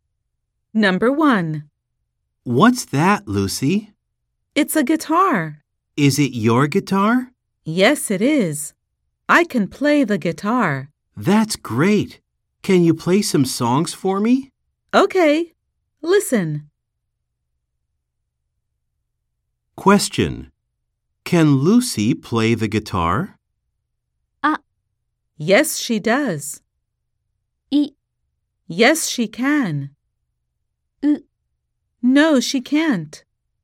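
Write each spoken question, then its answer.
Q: Can Lucy play the guitar?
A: B: Yes, she can.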